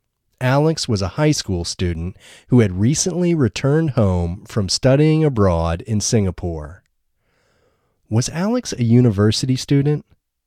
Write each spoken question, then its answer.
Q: Was Alex a university student?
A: No, Alex wasn't a university student.